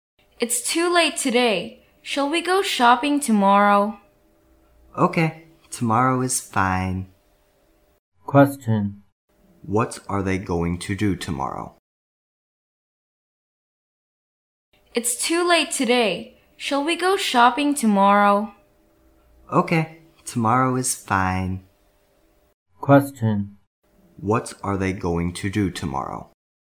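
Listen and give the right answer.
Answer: Go shopping.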